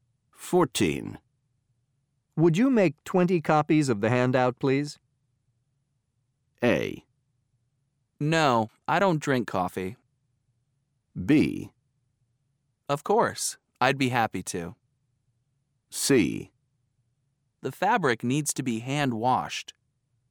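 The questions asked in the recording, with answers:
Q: Would you make 20 copies of the handout, please?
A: B: Of course, I'd be happy to.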